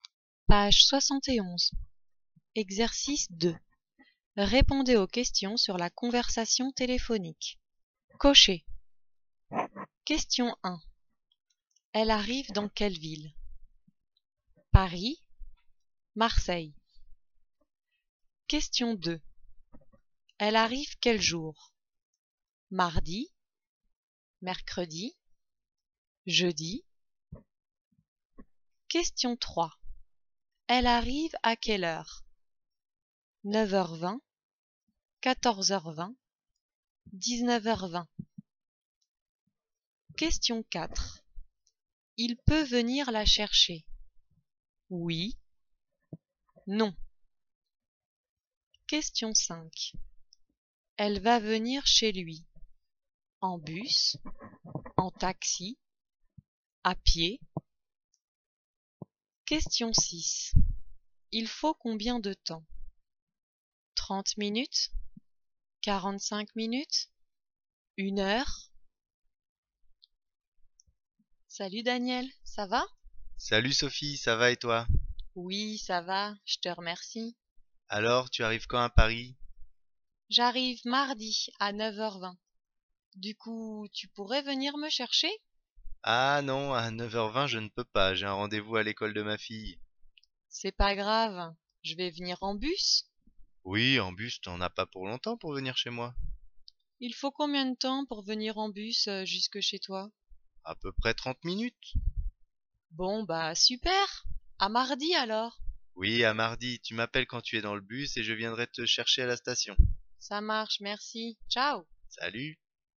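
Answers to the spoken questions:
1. Paris
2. Mardi
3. 9h20
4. Non
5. En bus
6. 30 minutes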